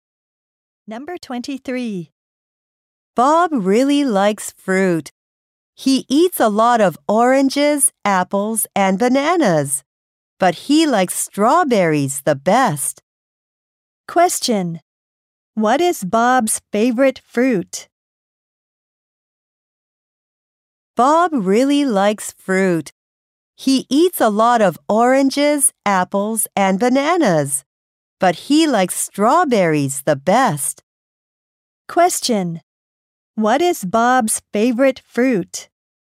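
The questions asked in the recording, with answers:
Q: What is Bob's favorite fruit?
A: Strawberries.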